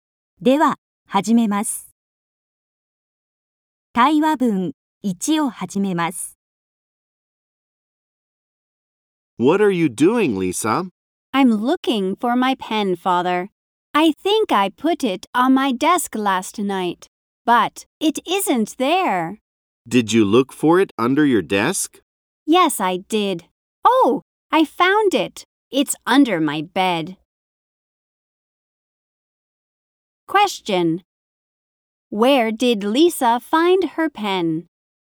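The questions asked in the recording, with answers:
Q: Where did Lisa find her pen?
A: Under her bed.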